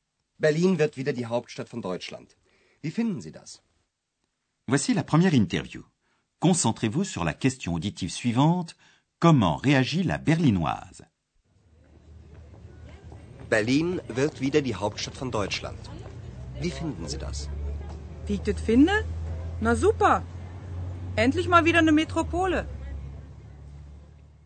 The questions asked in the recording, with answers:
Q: Comment réagit la Berlinoise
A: Dans son authentique dialecte berlinois, elle exprime sa satisfaction.